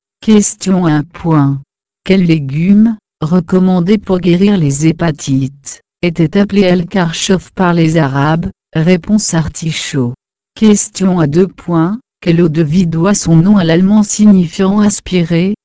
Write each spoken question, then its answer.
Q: Quel eau de vie doit son nom à l'allemand signifiant aspirer?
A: Réponse. Schnappen, schna.